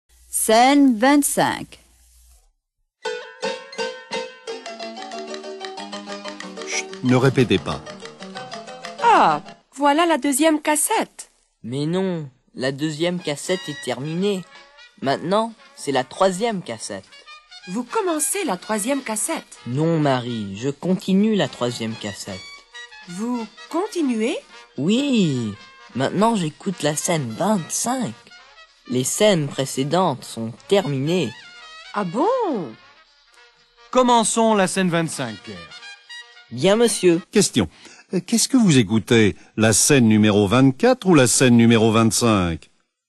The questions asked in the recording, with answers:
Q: Qu'est-ce que vous écoutez? La scène numéro 24 ou la scène numéro 25?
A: J'écoute la scène numéro 25.